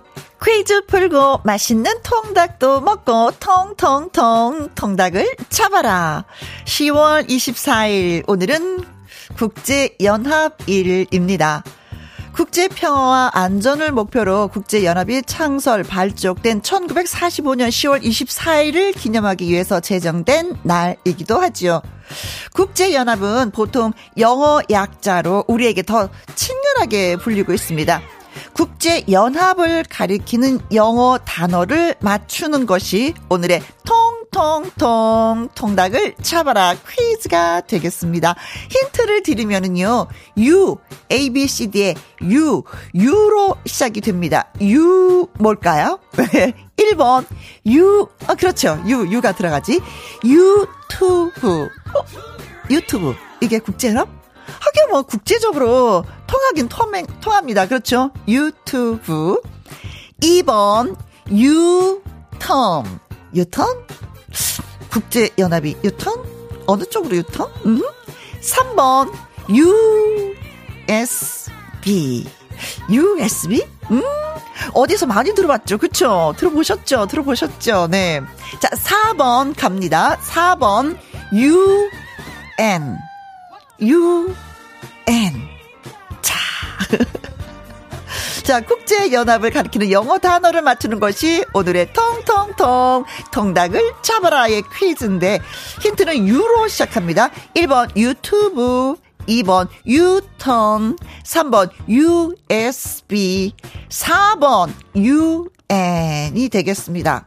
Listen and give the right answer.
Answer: 4번 UN. United Nation. 유엔이었습니다.